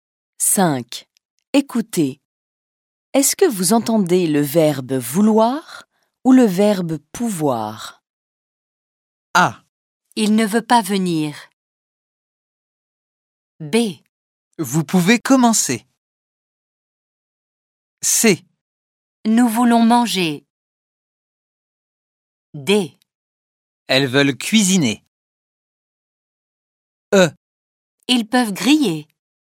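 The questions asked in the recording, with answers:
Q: Est-ce que vous entendez le verbe vouloir ou le verbe pouvoir?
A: vouloir

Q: Est-ce que vous entendez le verbe vouloir ou le verbe pouvoir?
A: pouvoir

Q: Est-ce que vous entendez le verbe vouloir ou le verbe pouvoir?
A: vouloir

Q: Est-ce que vous entendez le verbe vouloir ou le verbe pouvoir?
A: vouloir

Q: Est-ce que vous entendez le verbe vouloir ou le verbe pouvoir?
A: pouvoir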